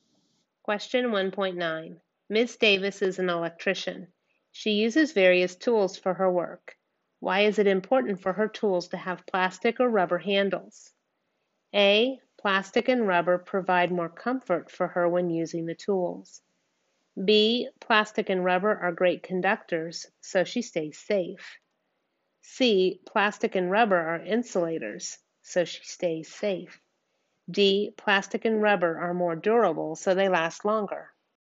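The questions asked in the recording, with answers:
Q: Why is it important for her tools to have plastic or rubber handles?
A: C: plastic and rubber are insulators, so she stays safe.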